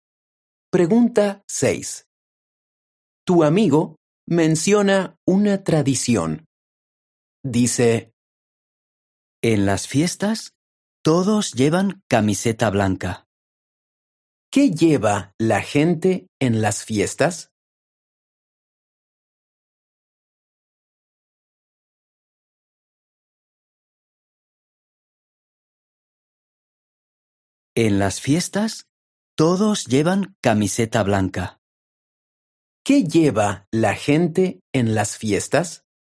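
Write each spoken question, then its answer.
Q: ¿Qué lleva la gente en las fiestas?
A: Camiseta blanca.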